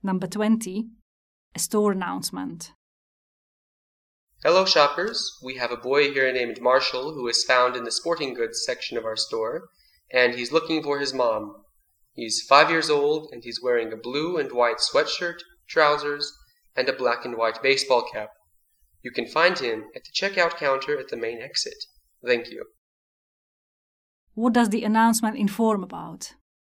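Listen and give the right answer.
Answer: A lost boy named Marshall who is looking for his mom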